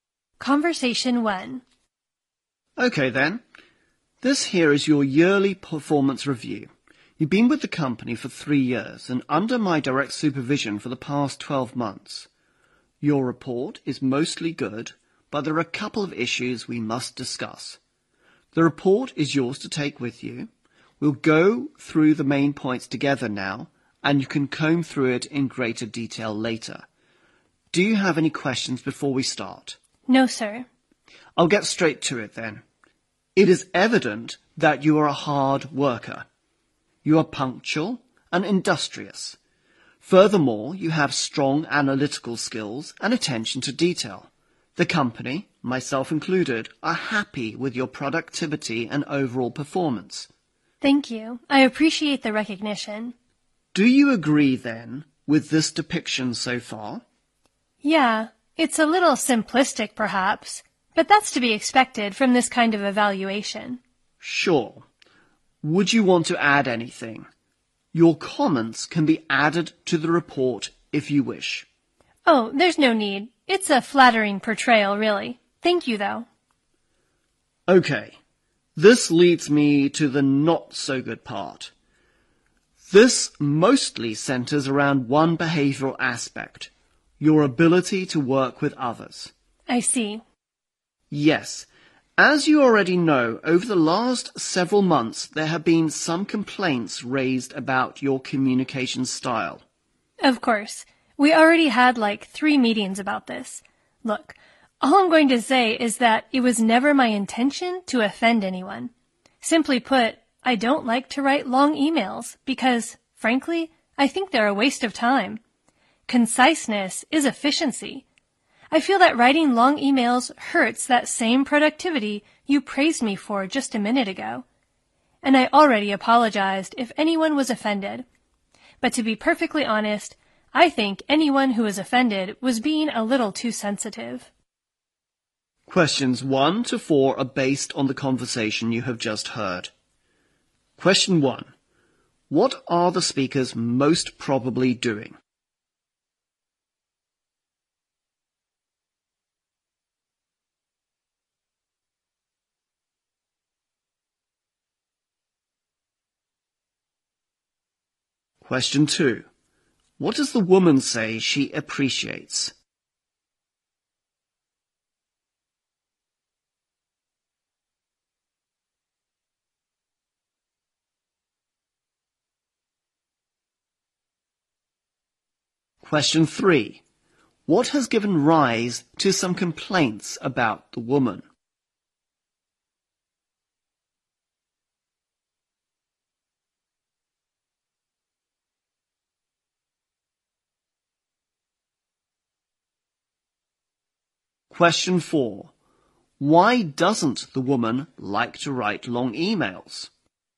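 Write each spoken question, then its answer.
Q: What are the speakers most probably doing?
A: Discussing the woman's yearly performance review

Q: What does the woman say she appreciates?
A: The recognition of her hard work and performance

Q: What has given rise to some complaints about the woman?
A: Her communication style

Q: Why doesn't the woman like to write long emails?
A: She thinks they are a waste of time and hurt productivity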